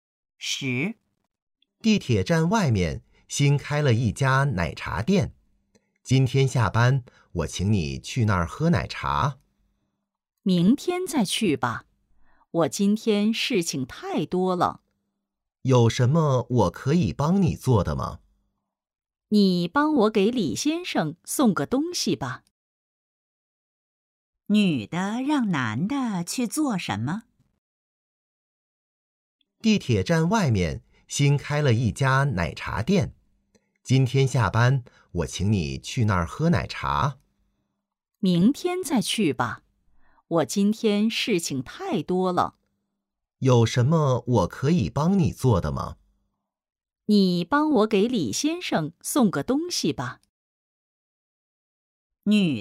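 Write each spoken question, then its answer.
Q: 女的让男的去做什么?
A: 给李先生送东西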